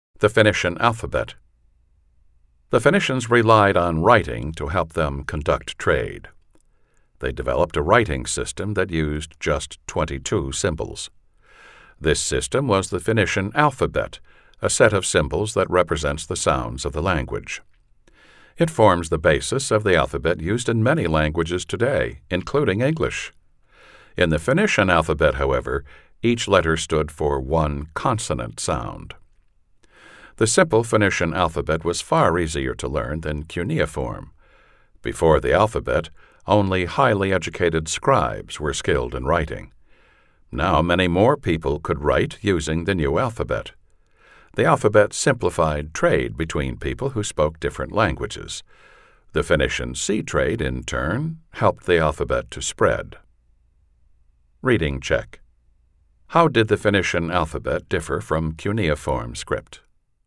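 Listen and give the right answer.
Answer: It used just 22 symbols standing for sounds, so it was far simpler and easier to learn than cuneiform.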